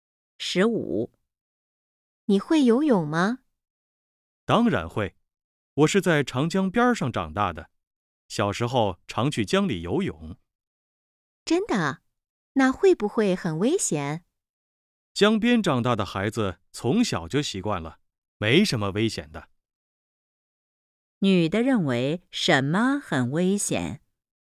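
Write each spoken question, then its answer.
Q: 女的认为什么很危险?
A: 在江里游泳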